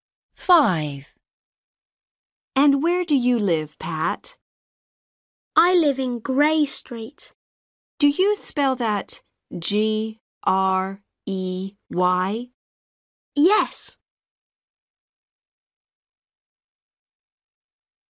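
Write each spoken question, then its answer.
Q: And where do you live, Pat?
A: Grey Street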